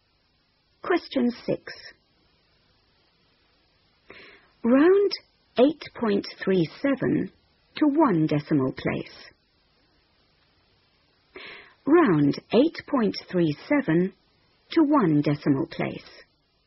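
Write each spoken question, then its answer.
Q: Round 8.37 to one decimal place.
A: 8.4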